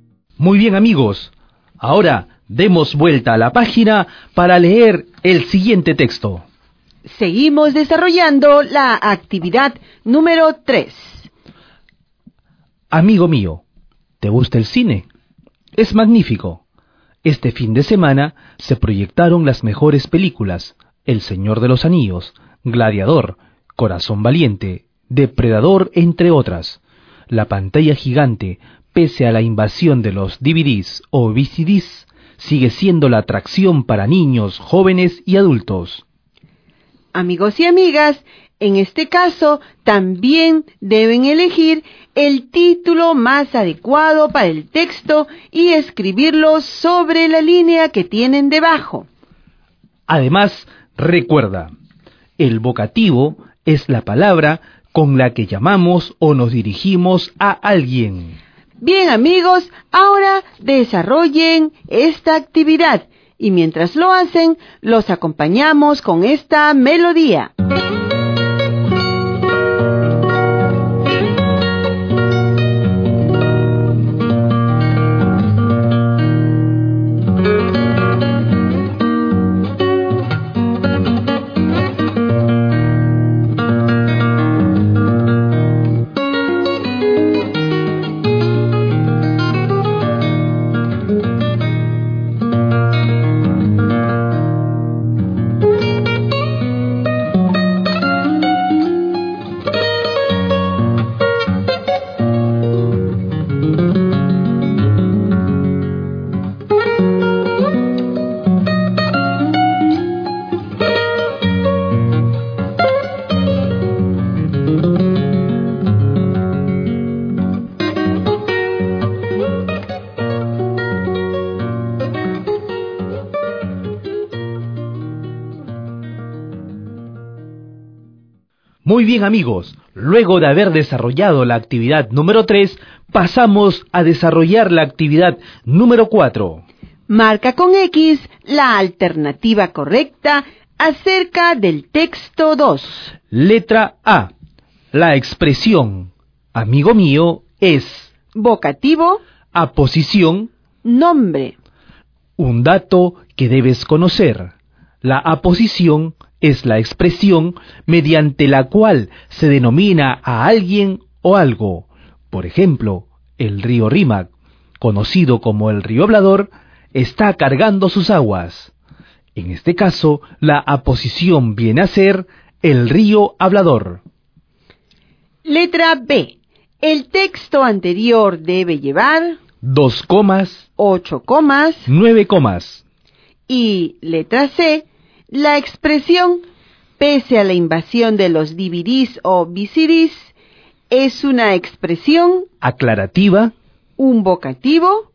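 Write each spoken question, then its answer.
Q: La expresión amigo mío es...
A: A: Vocativo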